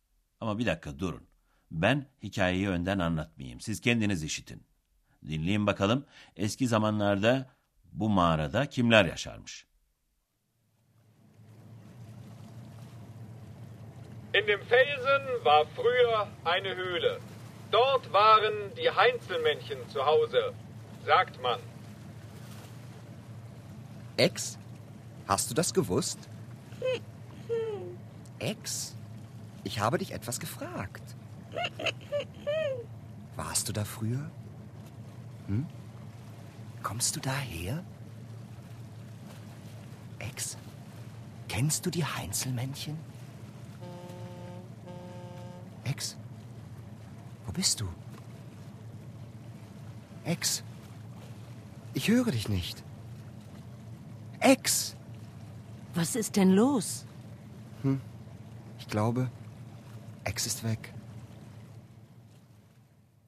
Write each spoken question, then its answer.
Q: Eski zamanlarda bu mağarada kimler yaşarmış?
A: Heinzelmännchen, yani Köln'ün sevimli cüceleri orada yaşarlarmış.